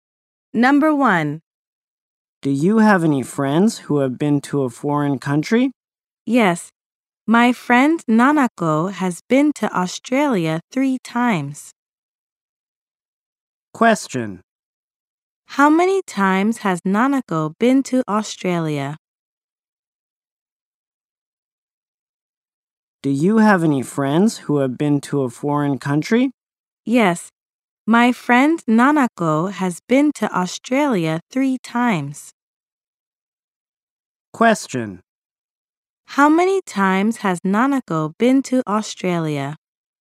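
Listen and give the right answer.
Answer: Three times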